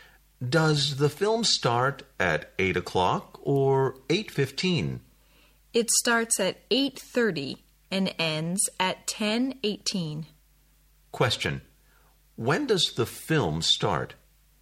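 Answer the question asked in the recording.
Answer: At 8:30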